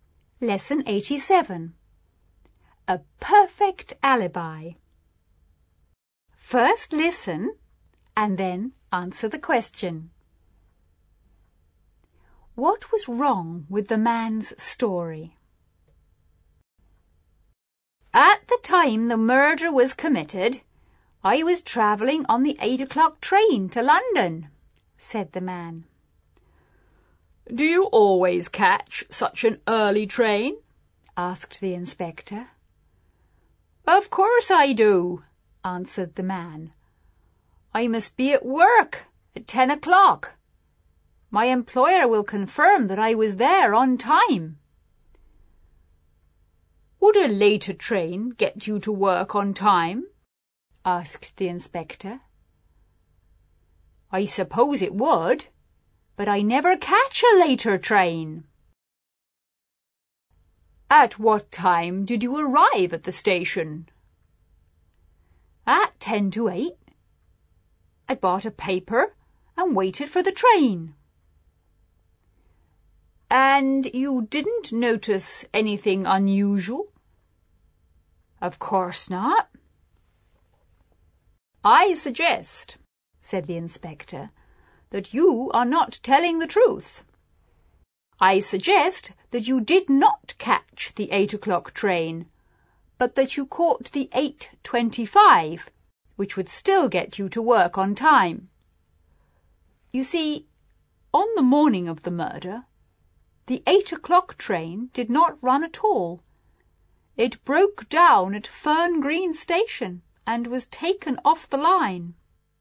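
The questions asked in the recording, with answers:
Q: What was wrong with the man's story?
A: He said he caught the 8 o'clock train, but that train did not run that morning because it broke down at Fern Green Station.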